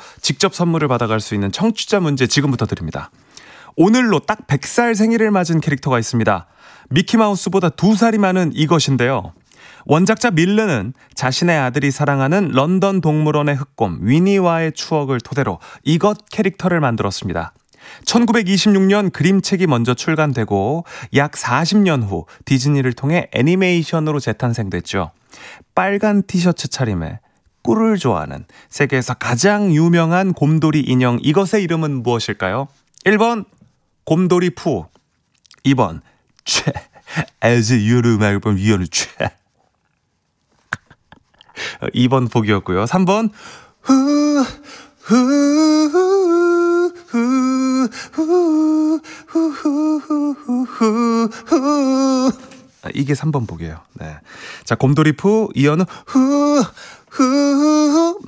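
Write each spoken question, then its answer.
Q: 빨간 티셔츠 차림에 꿀을 좋아하는 세계에서 가장 유명한 곰돌이 인형 이것의 이름은 무엇일까요?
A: 1: 곰돌이 푸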